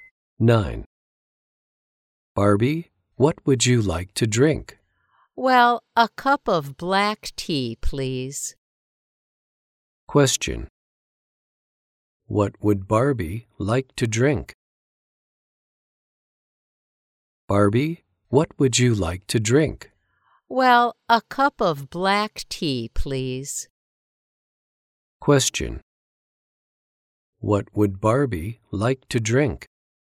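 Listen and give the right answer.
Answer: A cup of black tea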